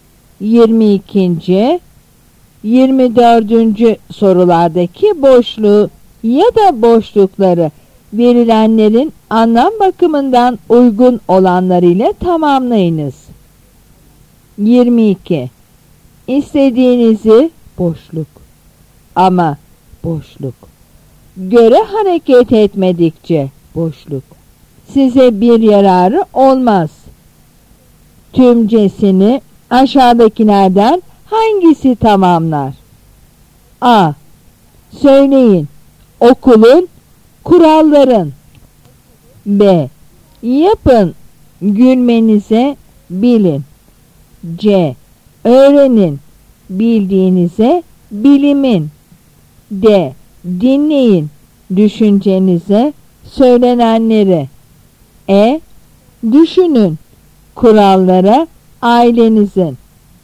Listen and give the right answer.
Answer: Yanıt C.